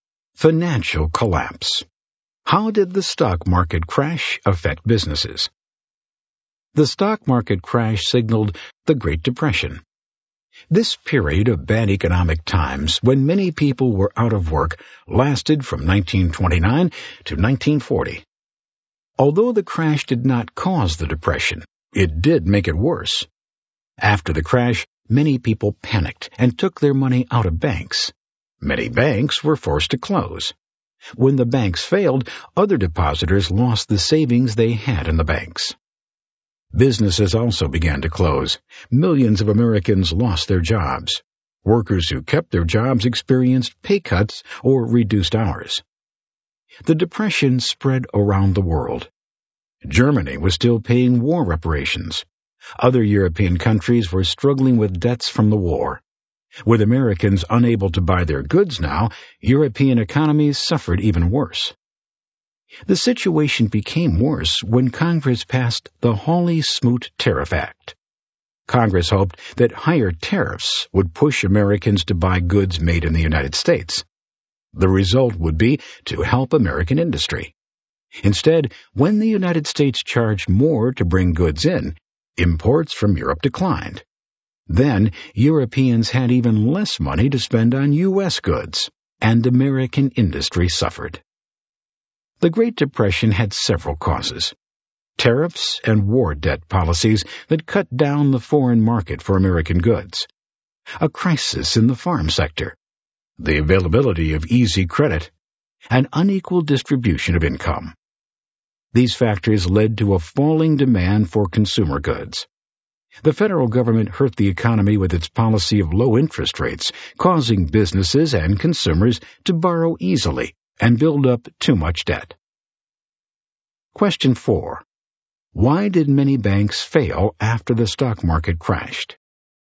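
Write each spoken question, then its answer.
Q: Why did many banks fail after the stock market crashed?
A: People panicked and withdrew their money from the banks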